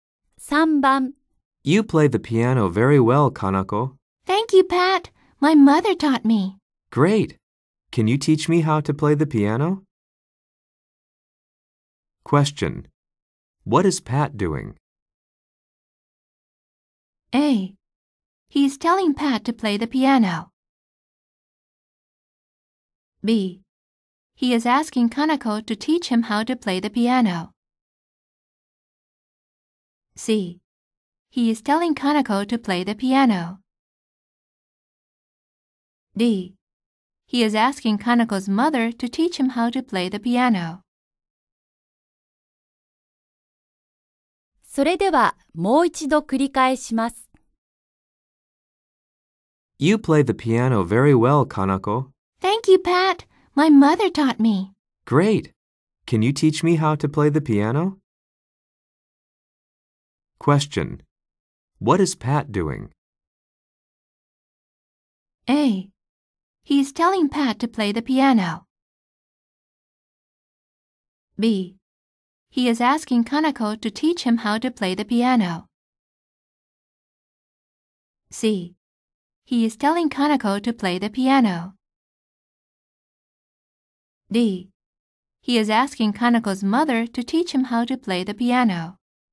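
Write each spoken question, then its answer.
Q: What is Pat doing?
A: B: He is asking Kanako to teach him how to play the piano.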